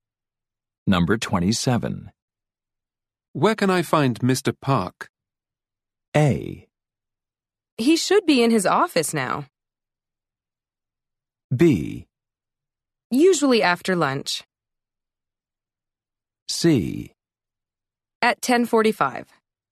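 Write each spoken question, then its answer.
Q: Where can I find Mr. Park?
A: A: He should be in his office now.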